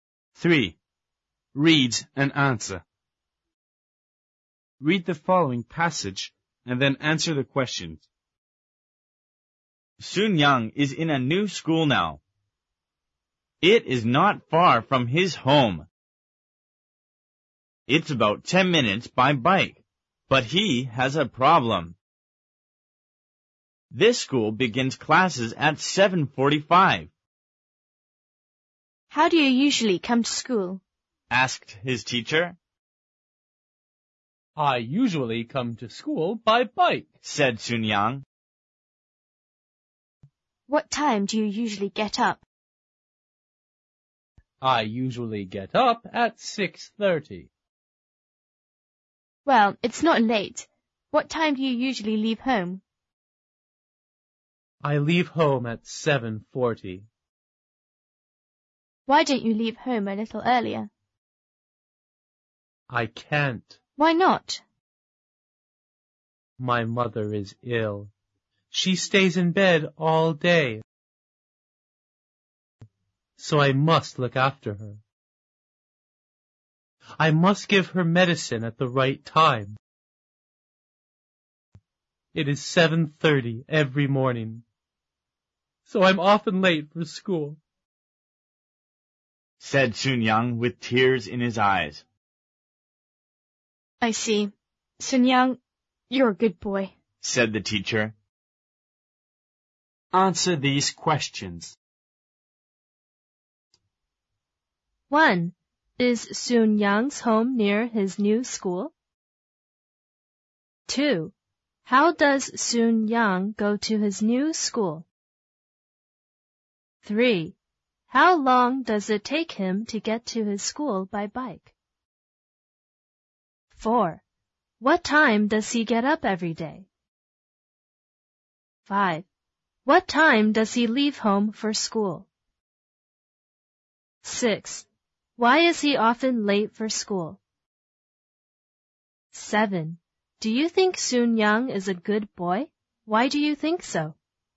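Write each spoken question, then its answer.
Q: Is Sun Yang's home near his new school?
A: Yes, it is not far from his home.

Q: How does Sun Yang go to his new school?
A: By bike.

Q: How long does it take him to get to his school by bike?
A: About 10 minutes.

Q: What time does he get up every day?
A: At 6:30.

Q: What time does he leave home for school?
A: At 7:40.

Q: Why is he often late for school?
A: His mother is ill and he must look after her and give her medicine at 7:30.

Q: Do you think Soon Young is a good boy?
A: Yes, because he looks after his ill mother.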